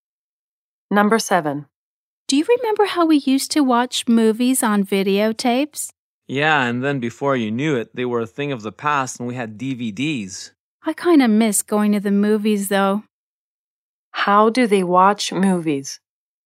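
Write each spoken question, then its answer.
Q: How do they watch movies?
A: On DVDs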